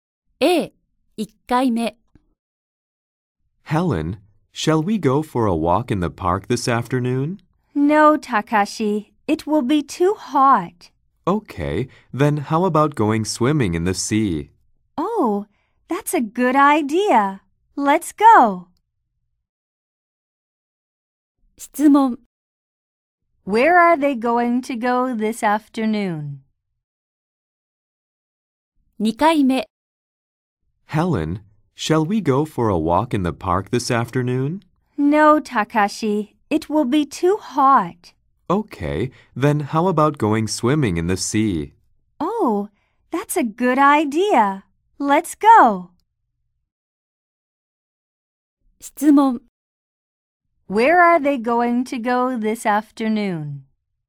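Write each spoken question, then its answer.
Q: Where are they going to go this afternoon?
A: To the sea, to go swimming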